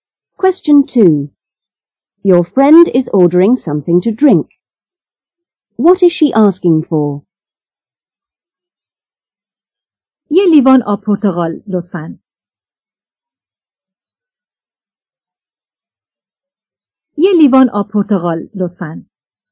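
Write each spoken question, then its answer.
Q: What is she asking for?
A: A glass of orange juice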